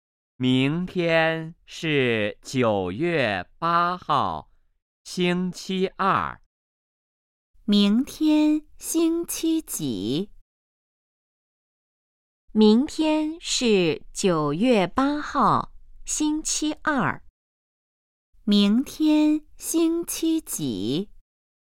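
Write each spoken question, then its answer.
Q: 明天星期几?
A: 星期二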